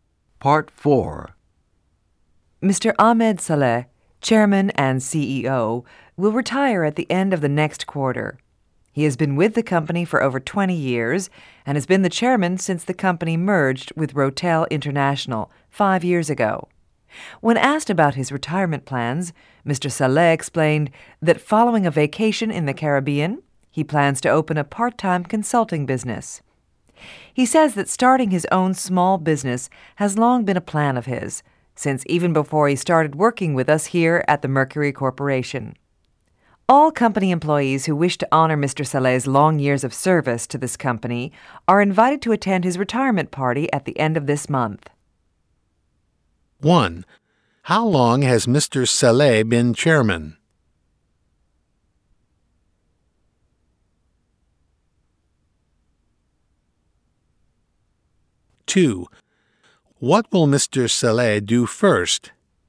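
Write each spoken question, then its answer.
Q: How long has Mr. Saleh been chairman?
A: 5 years

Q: What will Mr. Saleh do first?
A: Take a vacation in the Caribbean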